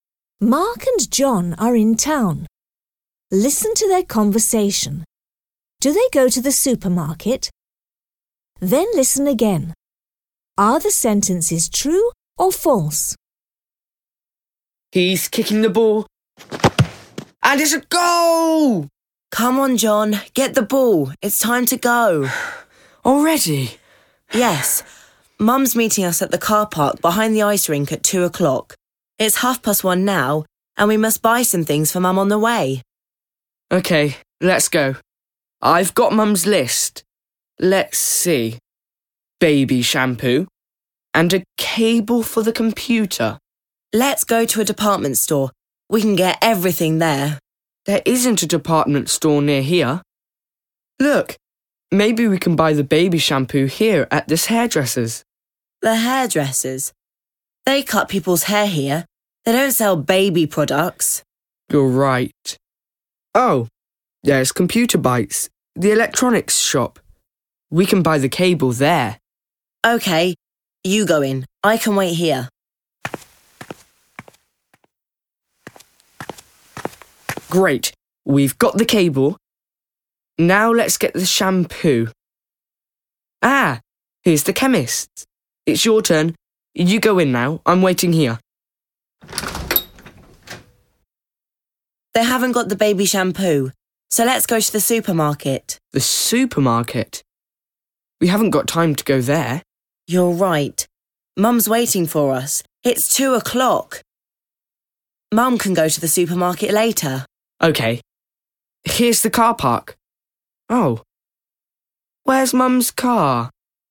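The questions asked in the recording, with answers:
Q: Do they go to the supermarket?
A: No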